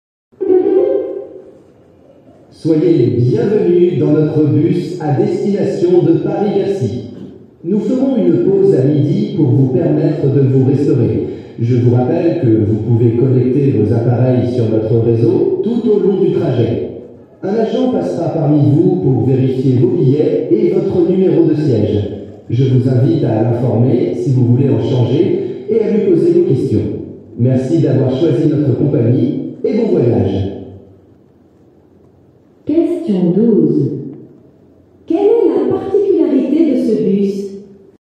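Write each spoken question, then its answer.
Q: Quelle est la particularité de ce bus ?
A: On peut connecter ses appareils au réseau pendant tout le trajet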